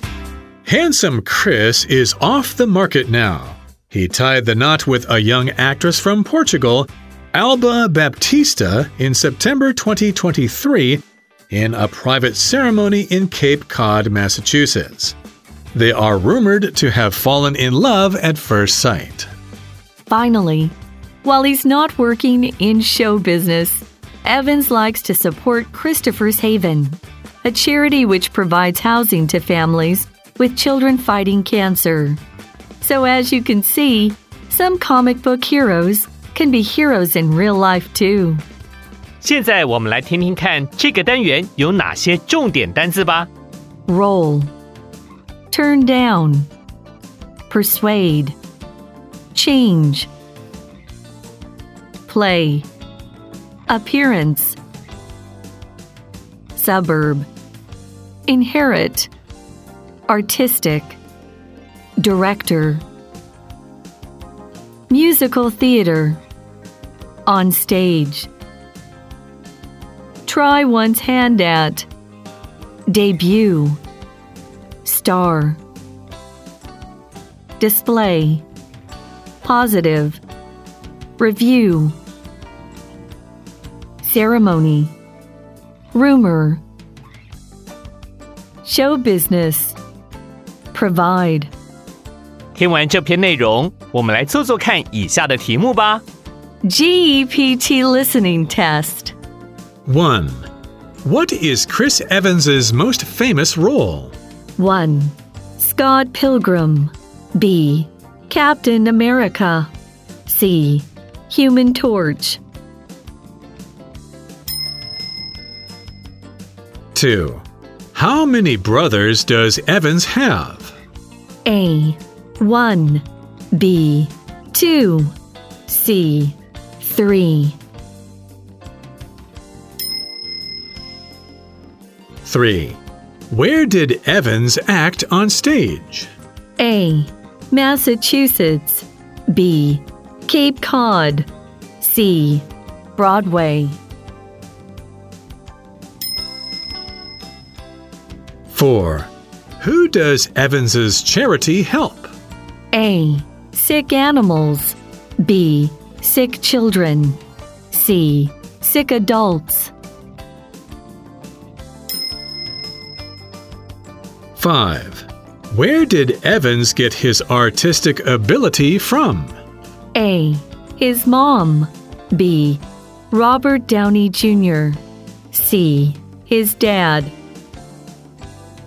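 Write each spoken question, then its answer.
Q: Who does Evans's charity help?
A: B: Sick children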